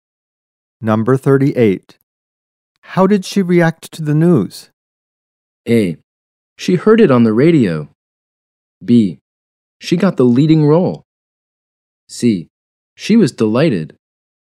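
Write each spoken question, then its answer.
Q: How did she react to the news?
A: C: She was delighted.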